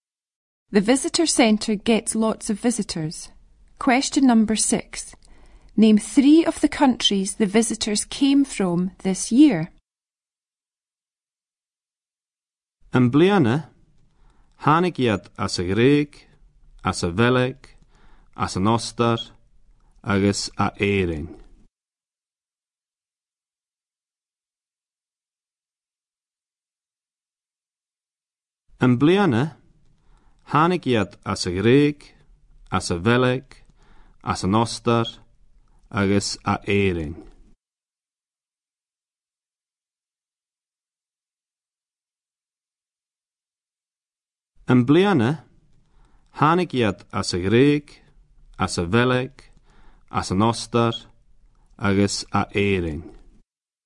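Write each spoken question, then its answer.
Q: Name 3 of the countries the visitors came from this year.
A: Greece, Belgium, Austria, Ireland (any three)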